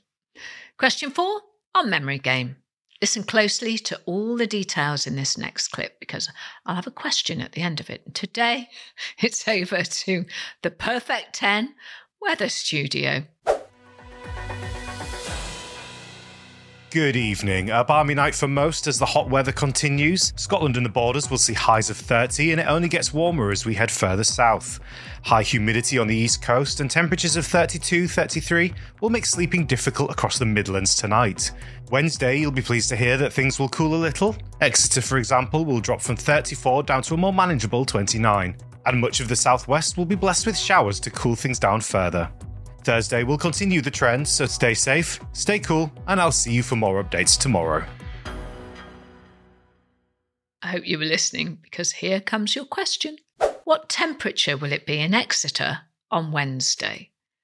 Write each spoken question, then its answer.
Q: What temperature will it be in Exeter on Wednesday?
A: The answer in the clip was 29 degrees.